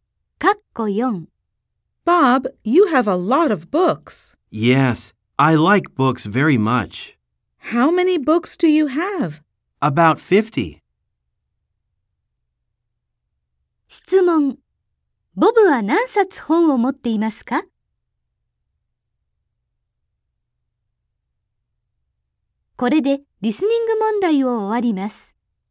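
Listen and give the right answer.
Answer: 約50冊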